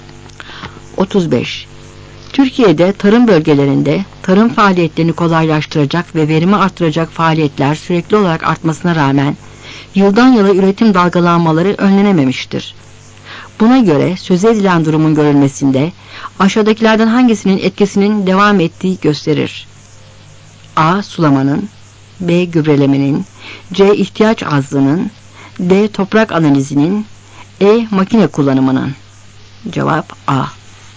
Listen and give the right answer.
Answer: Cevap A.